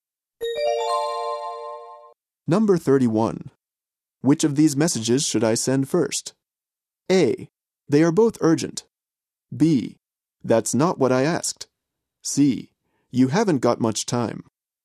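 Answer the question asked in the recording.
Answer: A: They are both urgent.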